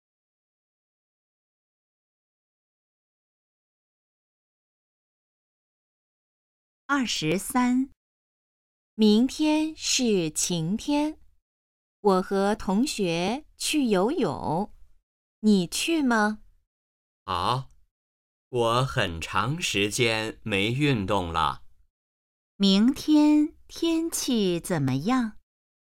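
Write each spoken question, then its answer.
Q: 明天天气怎么样?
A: 晴天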